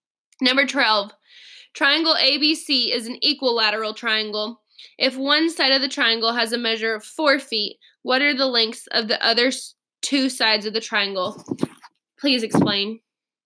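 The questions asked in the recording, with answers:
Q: If one side of the triangle has a measure of 4 feet, what are the lengths of the other two sides of the triangle?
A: 4 feet each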